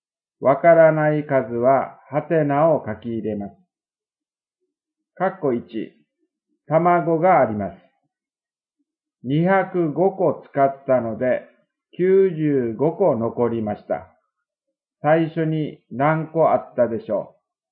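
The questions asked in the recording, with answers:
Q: 最初に何個あったでしょう?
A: 300個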